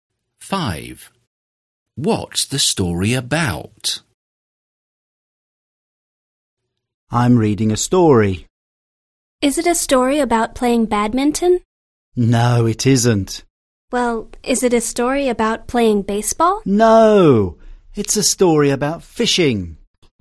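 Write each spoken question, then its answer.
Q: What's the story about?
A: Fishing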